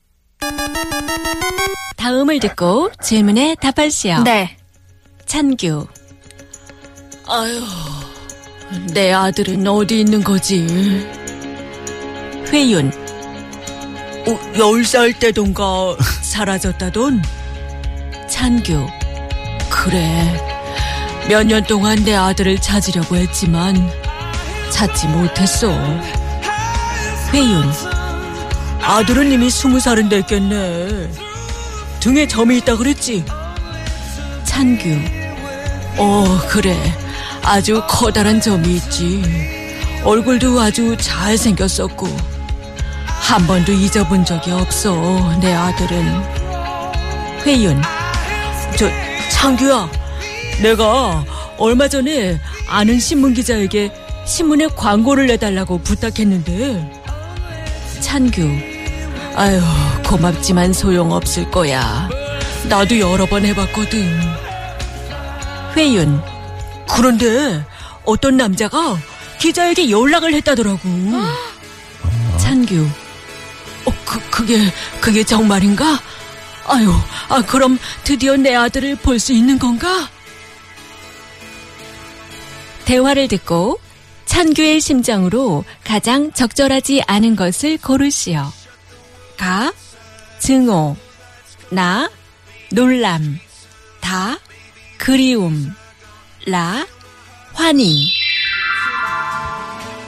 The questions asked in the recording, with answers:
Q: 대화를 듣고 찬규의 심정으로 가장 적절하지 않은 것을 고르시오.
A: The answer is Ka.